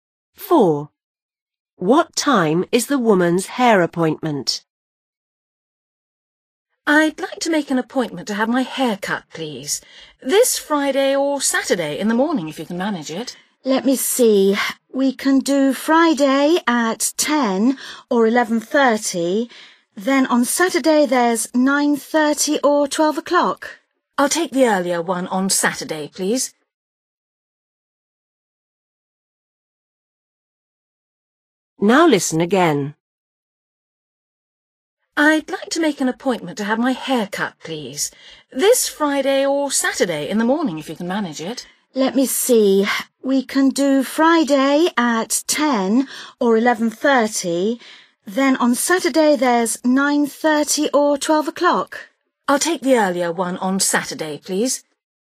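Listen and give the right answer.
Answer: 9:30 on Saturday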